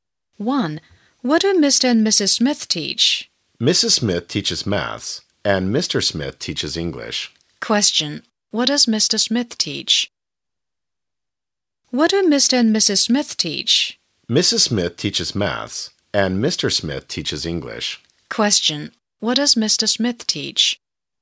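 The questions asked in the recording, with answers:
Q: What does Mr. Smith teach?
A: English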